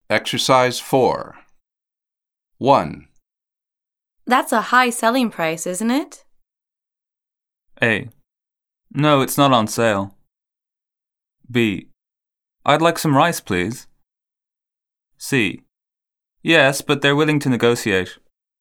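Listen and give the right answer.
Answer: C: Yes, but they're willing to negotiate.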